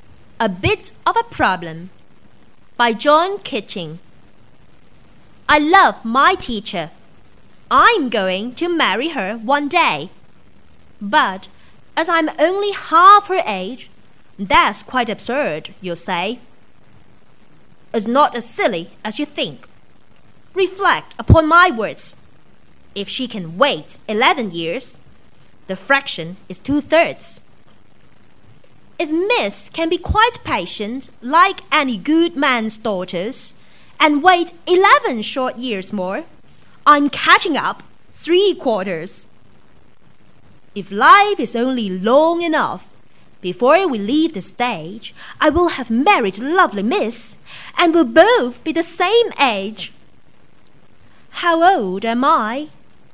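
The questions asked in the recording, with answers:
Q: How old am I?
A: 11 years old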